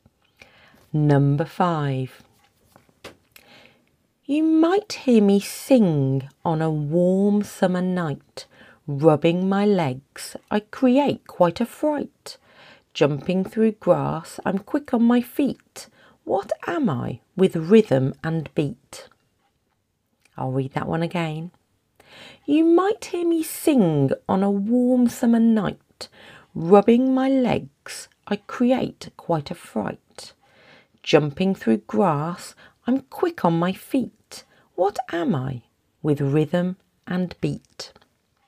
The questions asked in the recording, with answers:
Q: What am I with rhythm and beat?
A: That is a cricket.